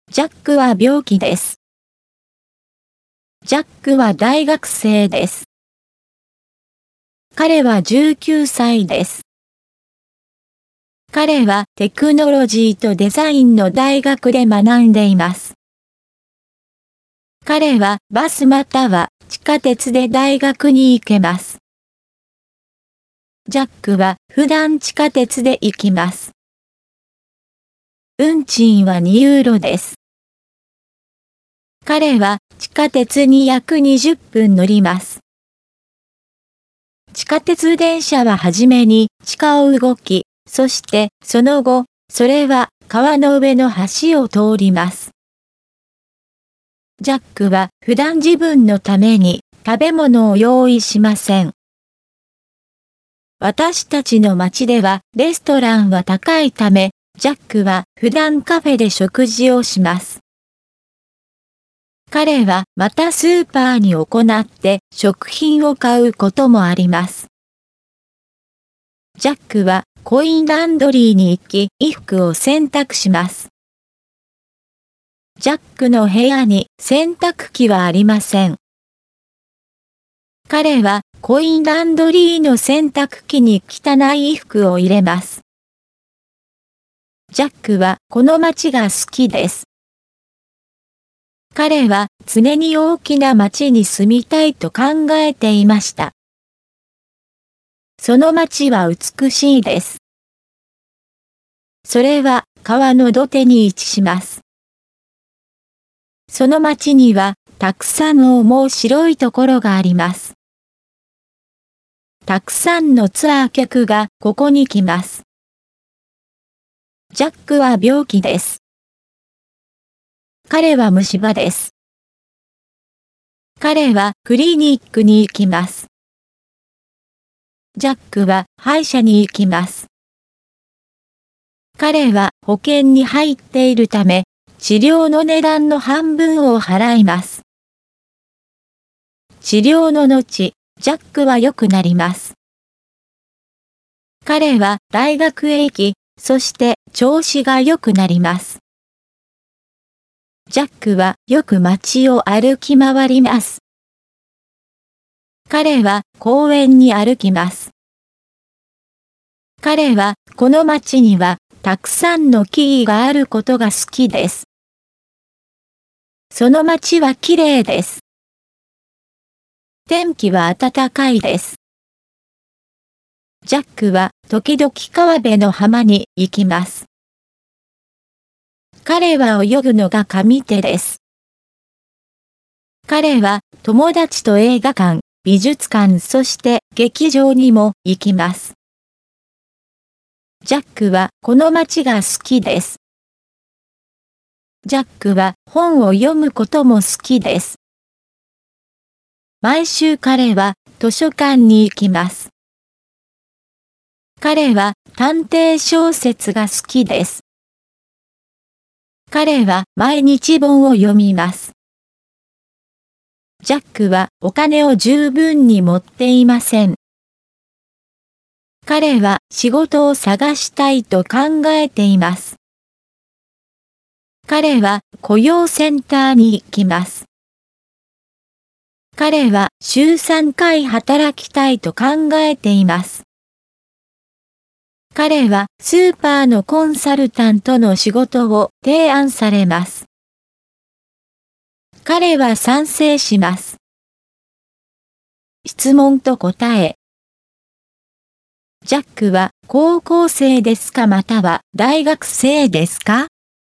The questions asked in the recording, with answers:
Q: ジャックは高校生ですかまたは大学生ですか?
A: ジャックは大学生です。